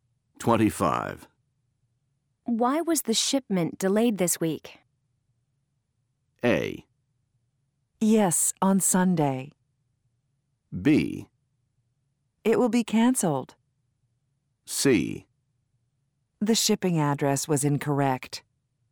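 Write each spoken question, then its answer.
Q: Why was the shipment delayed this week?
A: C: The shipping address was incorrect.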